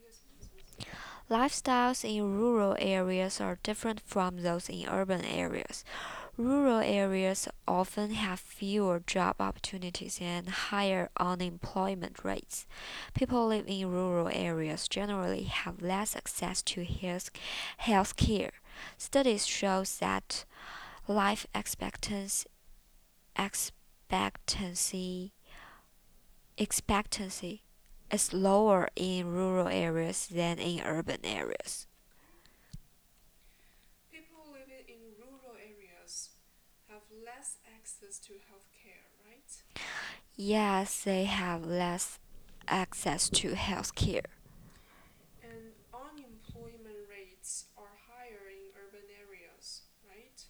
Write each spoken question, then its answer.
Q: And unemployment rates are higher in urban areas, right?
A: No, the unemployment rates are higher in rural areas.